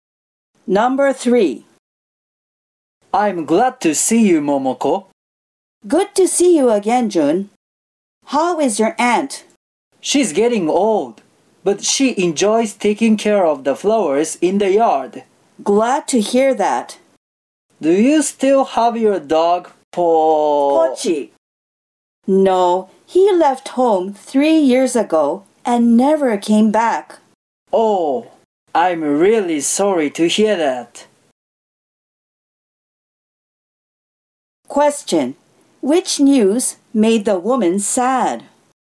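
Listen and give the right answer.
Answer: Pochi, the man's dog, left home 3 years ago and never came back.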